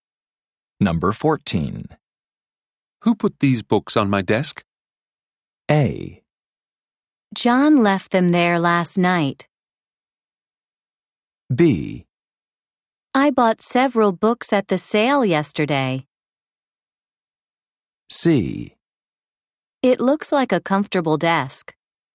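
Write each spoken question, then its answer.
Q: Who put these books on my desk?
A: A: John left them there last night.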